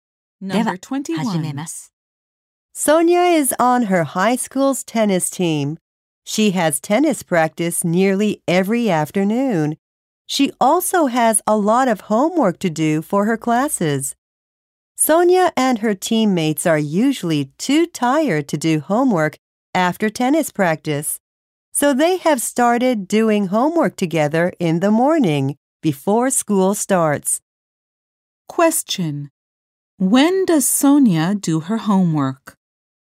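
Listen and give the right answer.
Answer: In the morning before school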